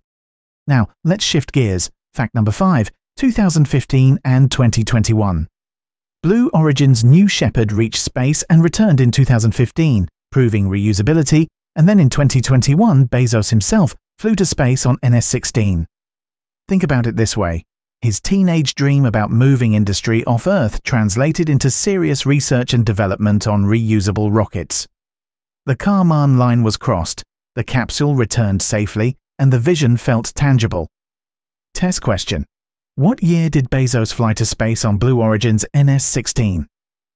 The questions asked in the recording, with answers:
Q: What year did Bezos fly to space on Blue Origin's NS-16?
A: Correct answer, 2021.